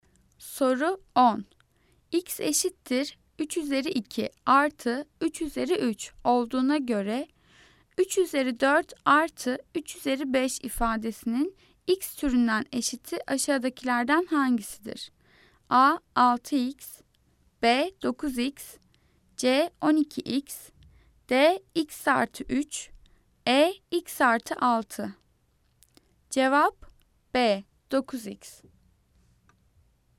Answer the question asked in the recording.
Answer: Cevap B. 9x.